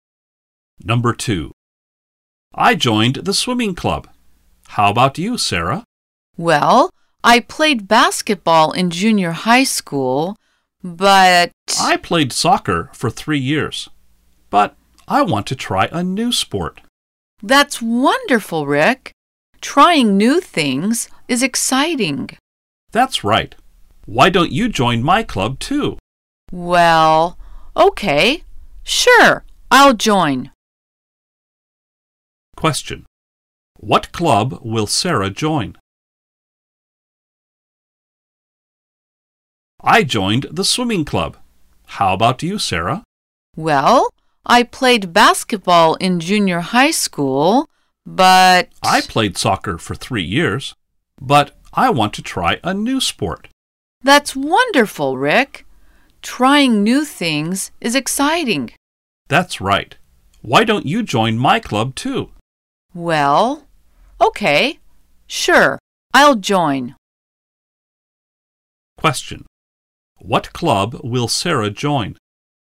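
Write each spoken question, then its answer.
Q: What club will Sarah join?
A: The swimming club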